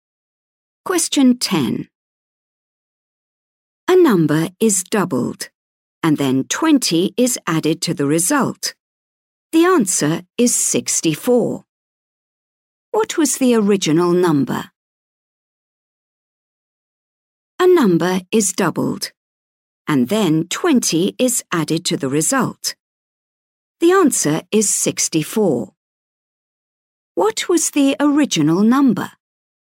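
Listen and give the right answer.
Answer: 22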